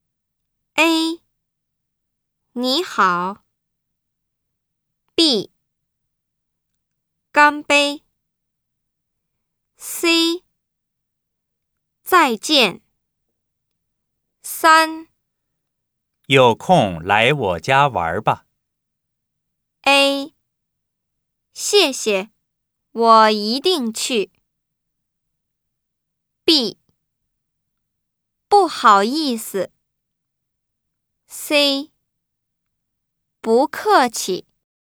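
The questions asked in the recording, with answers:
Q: 有空来我家玩吧。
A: A: 谢谢,我一定去。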